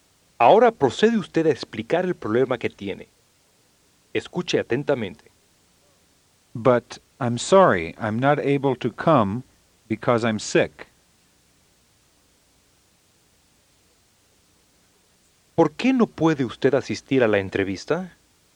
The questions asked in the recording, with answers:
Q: ¿Por qué no puede usted asistir a la entrevista?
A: Because I'm sick.